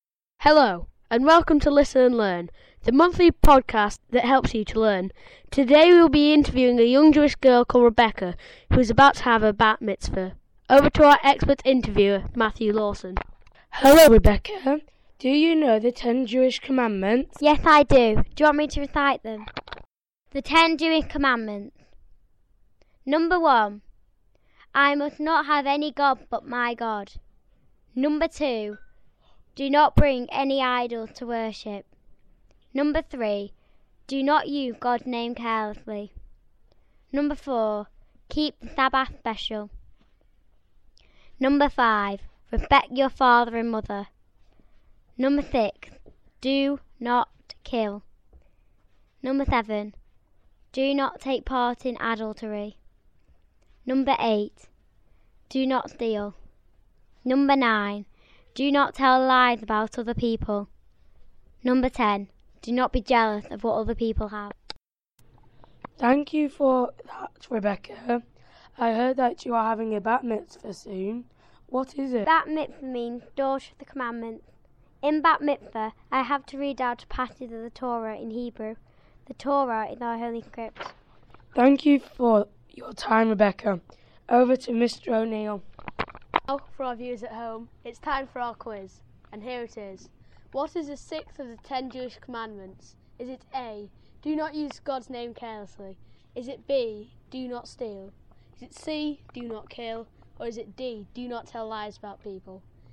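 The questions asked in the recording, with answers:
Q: What is the sixth of the 10 Jewish commandments?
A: C: do not kill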